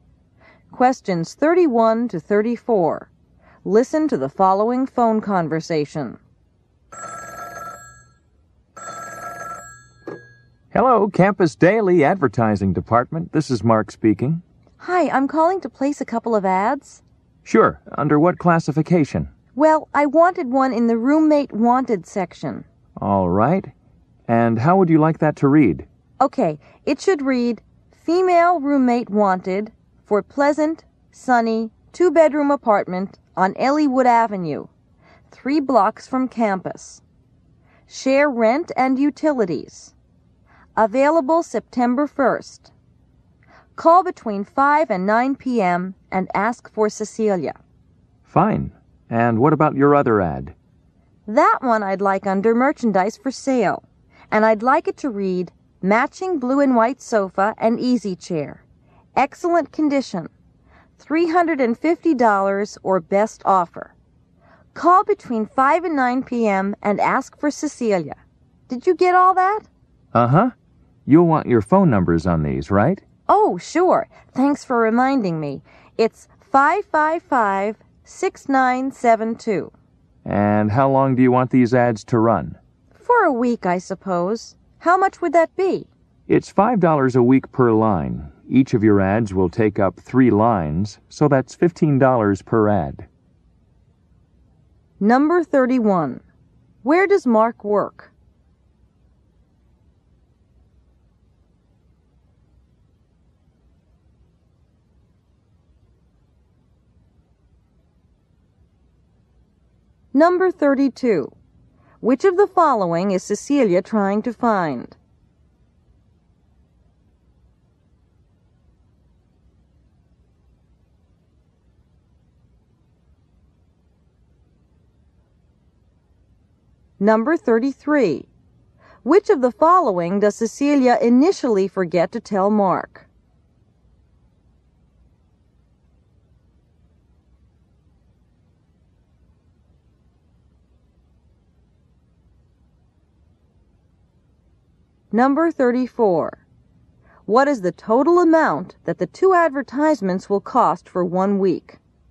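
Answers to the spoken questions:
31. At the Campus Daily advertising department
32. A female roommate
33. Her phone number
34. $30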